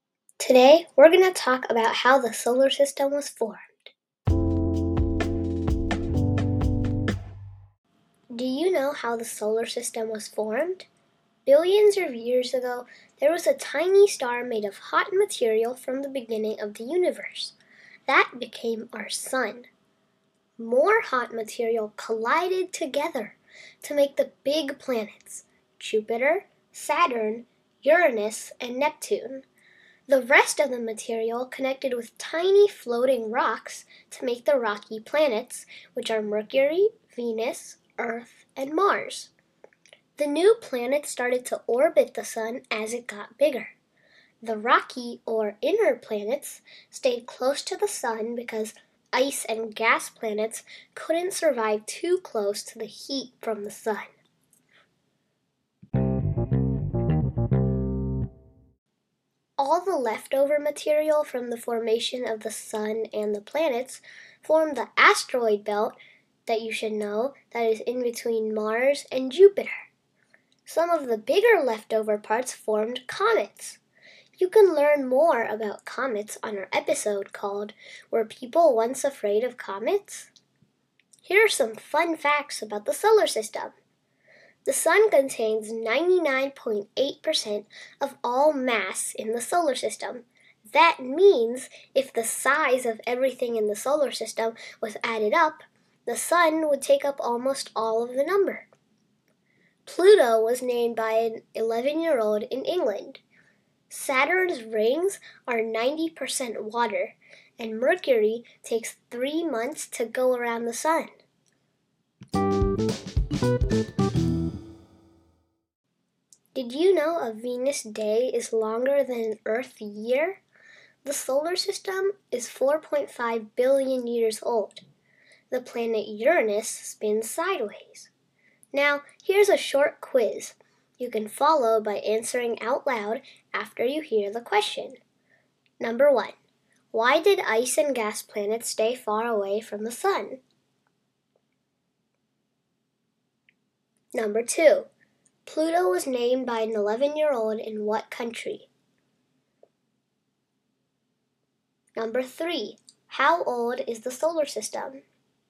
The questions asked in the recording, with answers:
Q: Why did ice and gas planets stay far away from the sun?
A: there's too much heat near the sun

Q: Pluto was named by an 11-year-old in what country?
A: England

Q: How old is the solar system?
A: 4.5 billion years old